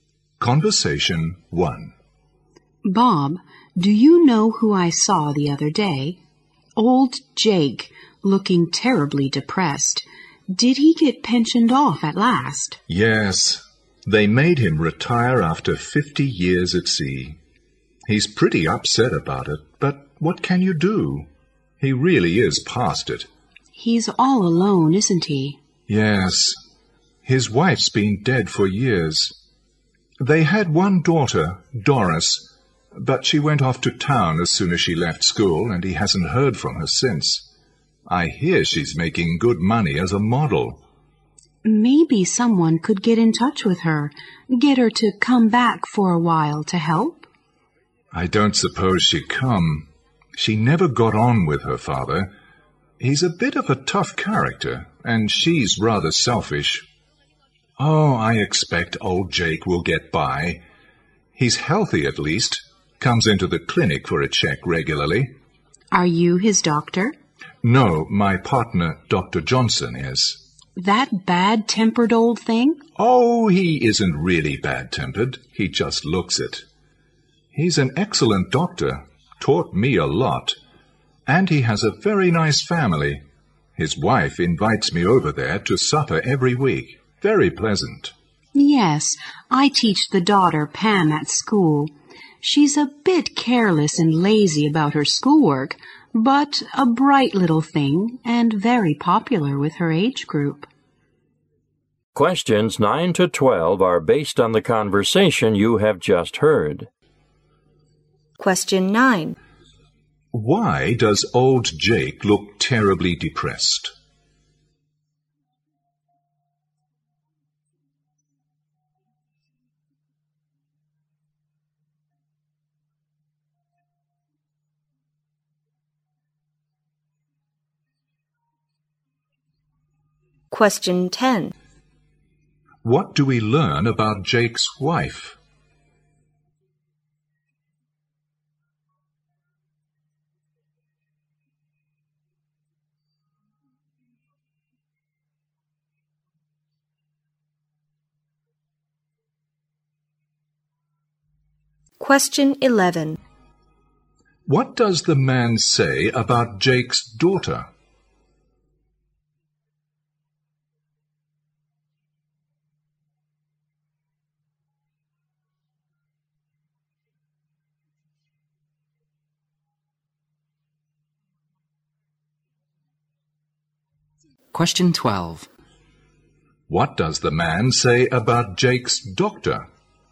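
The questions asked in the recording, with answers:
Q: Why does old Jake look terribly depressed?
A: He was made to retire after 50 years at sea.

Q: What do we learn about Jake's wife?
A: She died years ago.

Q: What does the man say about Jake's daughter?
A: She never got on with her father and probably won't come back.

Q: What does the man say about Jake's doctor?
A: He looks bad-tempered but is an excellent doctor.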